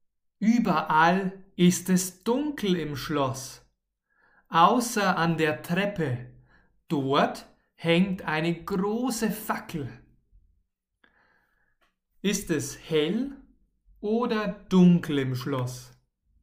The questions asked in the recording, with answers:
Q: Ist es hell oder dunkel im Schloss?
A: Dunkel. Es ist überall dunkel im Schloss.